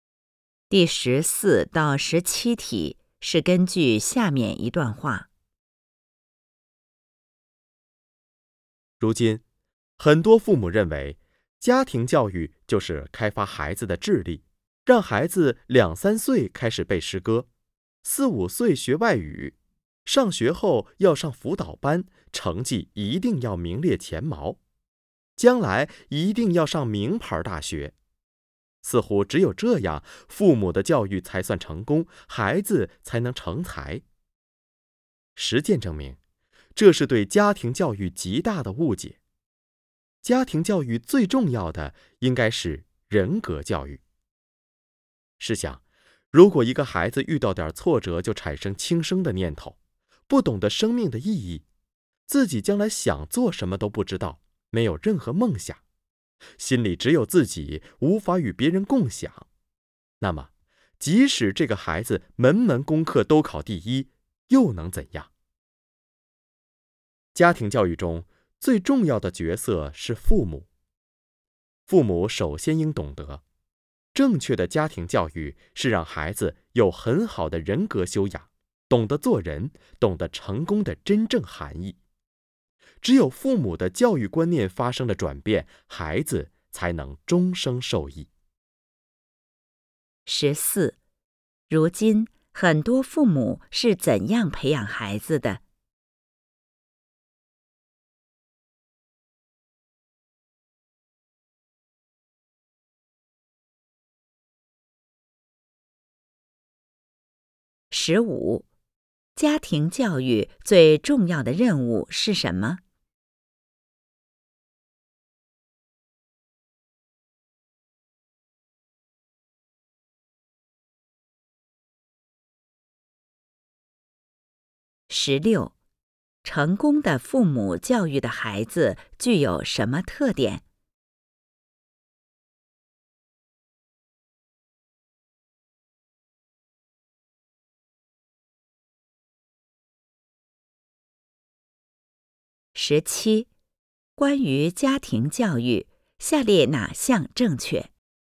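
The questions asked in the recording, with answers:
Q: 如今很多父母是怎样培养孩子的?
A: 注重开发孩子的智力

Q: 家庭教育最重要的任务是什么?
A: 人格教育

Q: 成功的父母教育的孩子具有什么特点?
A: 有很好的人格修养,懂得做人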